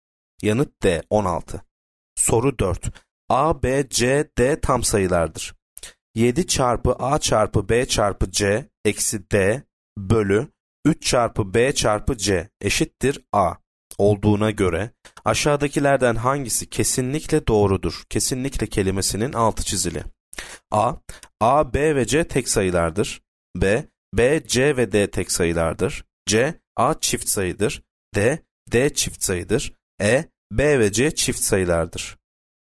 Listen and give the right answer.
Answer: Yanıt D. D çift sayıdır.